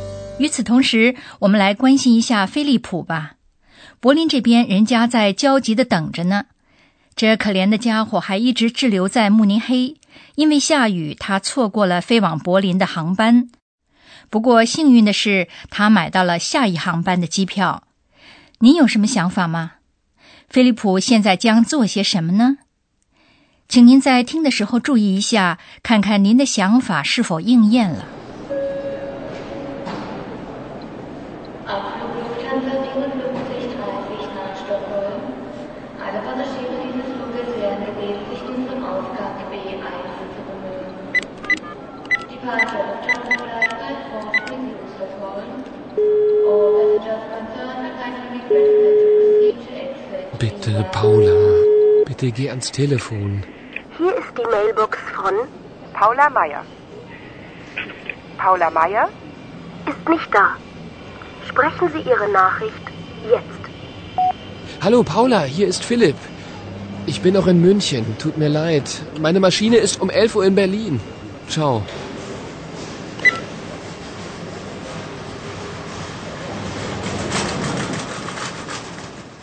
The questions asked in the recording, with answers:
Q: 菲利普现在将做些什么呢?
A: 菲利普试图给帕拉打电话。